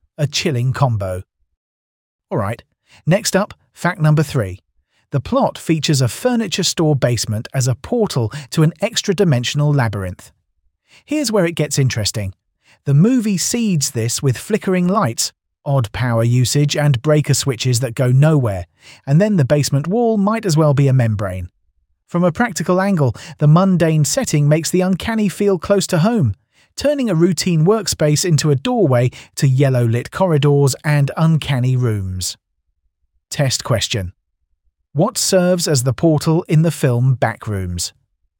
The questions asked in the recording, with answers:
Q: What serves as the portal in the film Backrooms?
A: Correct answer. A furniture store basement.